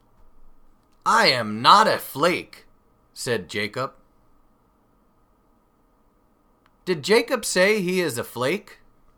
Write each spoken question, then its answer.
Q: Did Jacob say he is a flake?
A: No, he didn't. He said, I am not a flake.